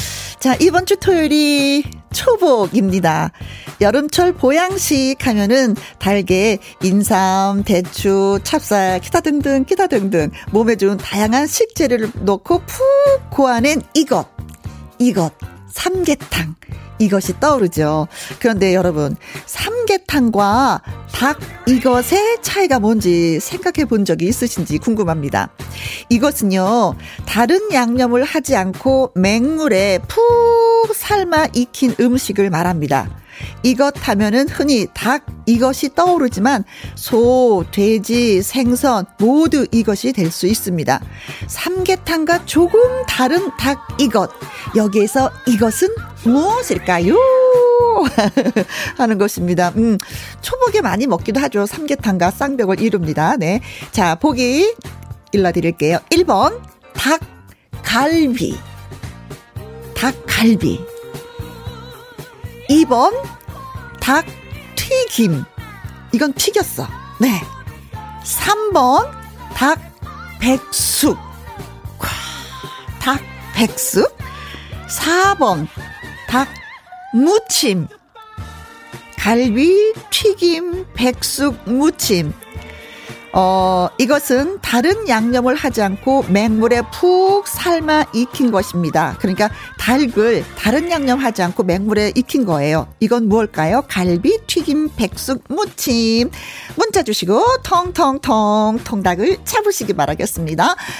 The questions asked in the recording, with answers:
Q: 삼계탕과 조금 다른 닭 이것. 여기에서 이것은 무엇일까요?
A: 자, 그래서 오늘의 정답은 백숙 닭백숙이 되겠습니다.